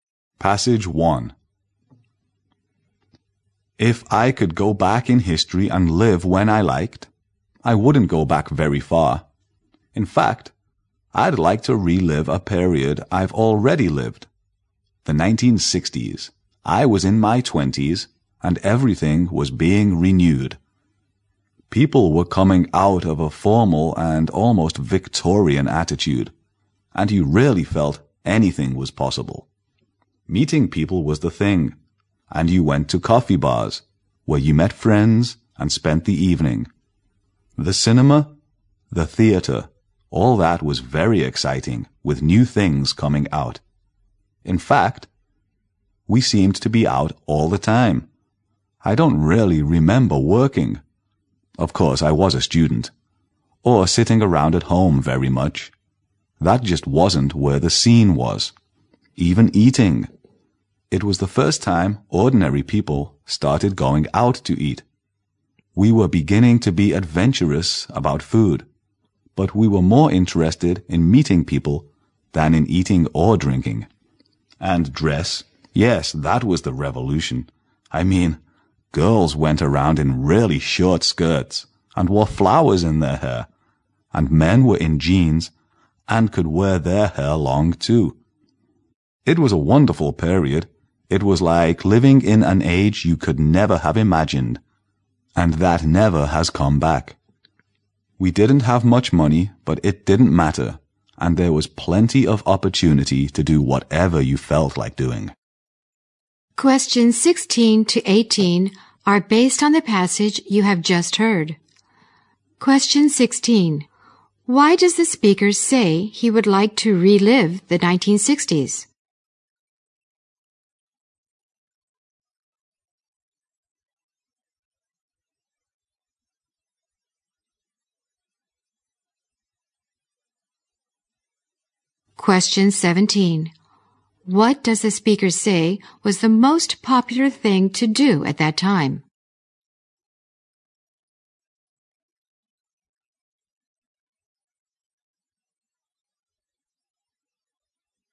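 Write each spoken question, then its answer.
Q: Why does the speaker say he would like to relive the 1960s?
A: Everything was being renewed and anything seemed possible

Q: What does the speaker say was the most popular thing to do at that time?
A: Meeting people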